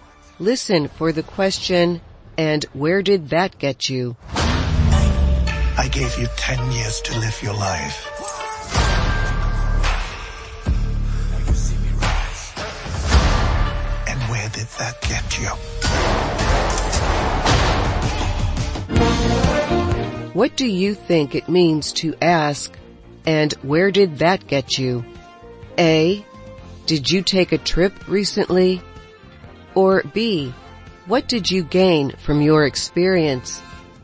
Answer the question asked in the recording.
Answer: The answer is B. And where did that get you is the same as asking, what did you gain from your experience?